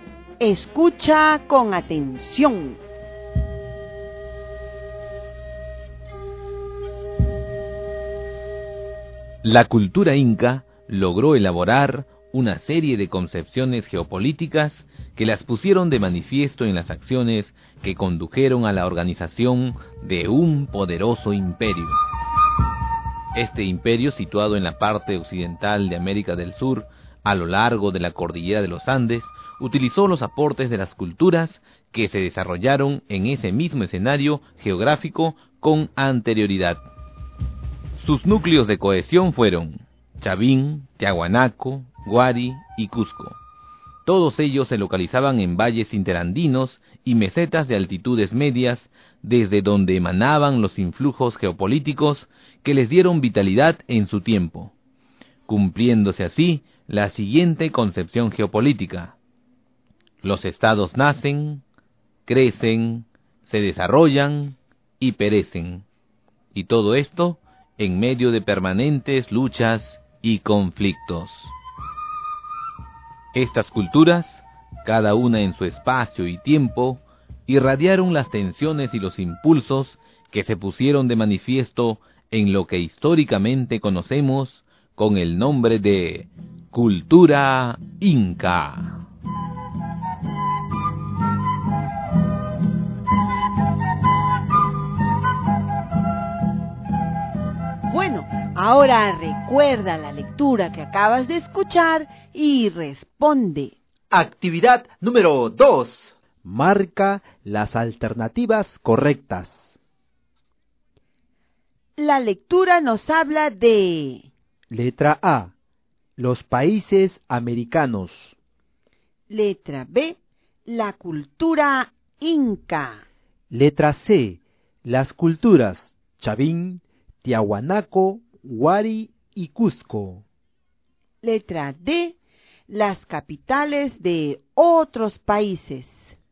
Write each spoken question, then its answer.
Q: La lectura nos habla de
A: la letra B y la letra C, porque el texto nos hablaba de la cultura inca y también de las culturas Chavín, Tiahuanaco, Huari y Cusco.